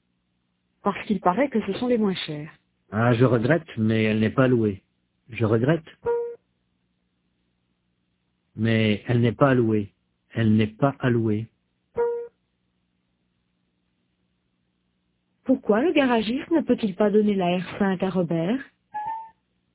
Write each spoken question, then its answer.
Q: Pourquoi le garagiste ne peut-il pas donner la R5 à Robert?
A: Parce qu'elle n'est pas allouée.